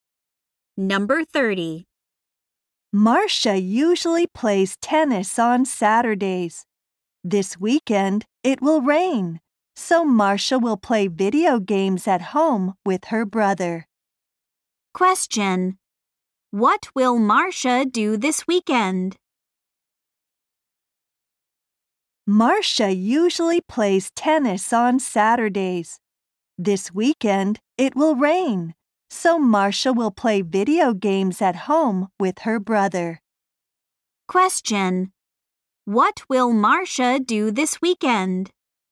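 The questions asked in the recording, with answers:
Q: What will Marcia do this weekend?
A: Play video games at home with her brother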